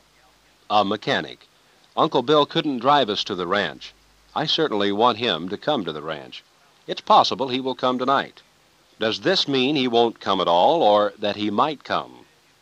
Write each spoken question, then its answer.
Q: Does this mean he won't come at all or that he might come?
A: He might come.